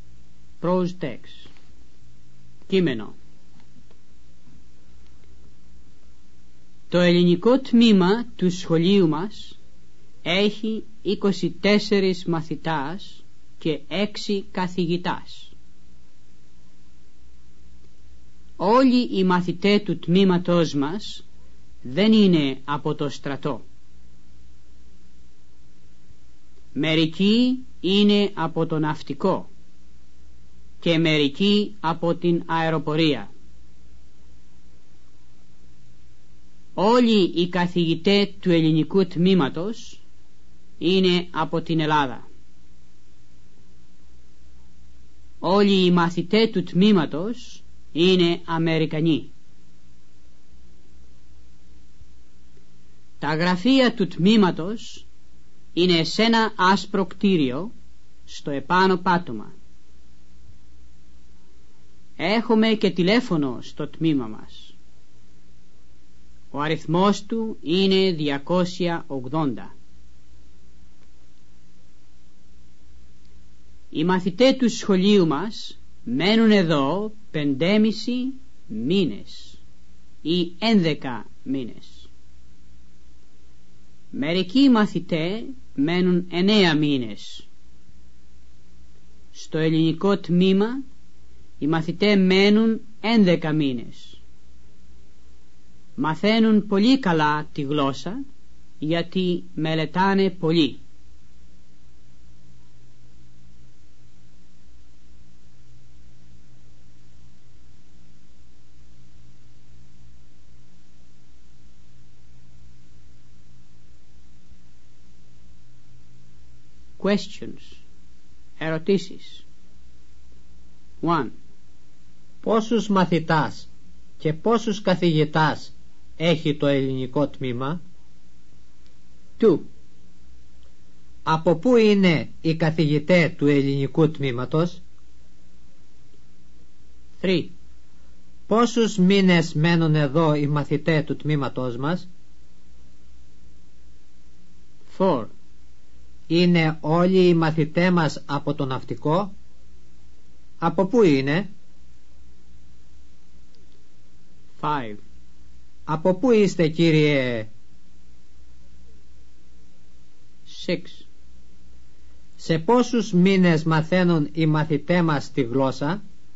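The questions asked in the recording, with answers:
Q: Πόσους μαθητάς και πόσους καθηγητάς έχει το ελληνικό τμήμα?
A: 24 μαθητάς και 6 καθηγητάς

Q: Από πού είναι οι καθηγητές του ελληνικού τμήματος?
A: Από την Ελλάδα

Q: Πόσους μήνες μένουν εδώ οι μαθητές του τμήματός μας?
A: 11 μήνες

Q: Είναι όλοι οι μαθητές μας από το ναυτικό?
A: Όχι

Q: Σε πόσους μήνες μαθαίνουν οι μαθητές μας τη γλώσσα?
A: Σε 11 μήνες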